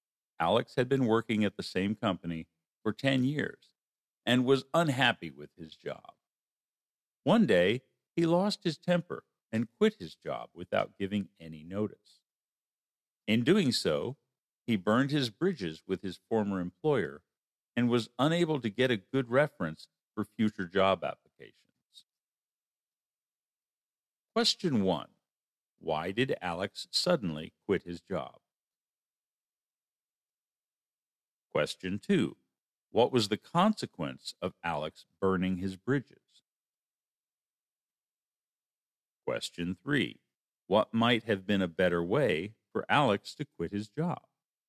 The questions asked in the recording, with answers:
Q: Why did Alex suddenly quit his job?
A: He lost his temper.

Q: What was the consequence of Alex burning his bridges?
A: He was unable to get a good reference from his former employer.

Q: What might have been a better way for Alex to quit his job.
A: He could have given his employer advance notice that he was going to quit.